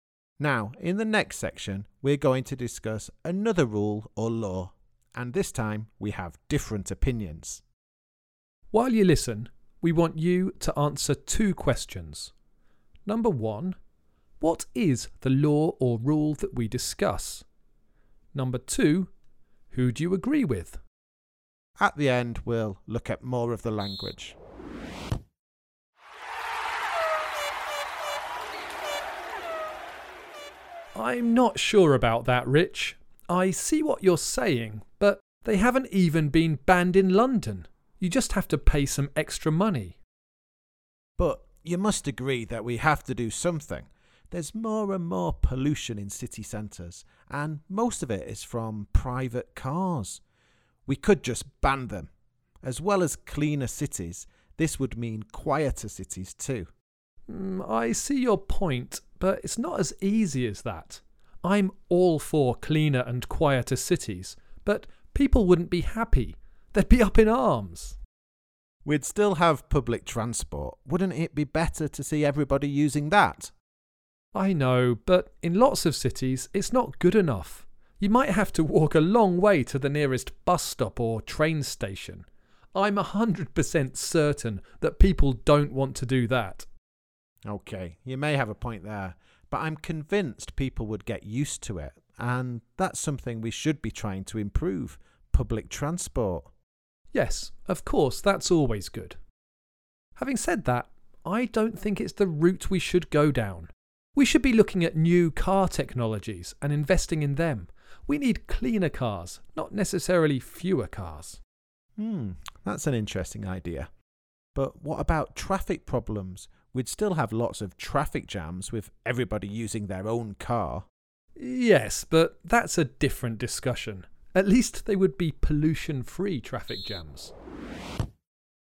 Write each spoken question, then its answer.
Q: Number one, what is the law or rule that we discuss?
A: In the last section, the rule that we discussed was whether cars should be banned in city centres.